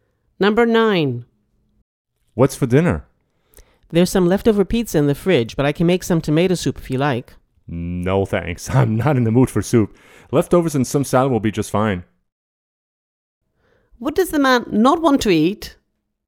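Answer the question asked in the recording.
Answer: Tomato soup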